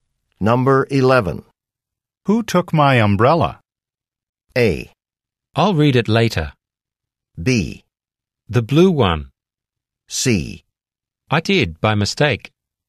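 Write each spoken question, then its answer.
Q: Who took my umbrella?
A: C: I did, by mistake.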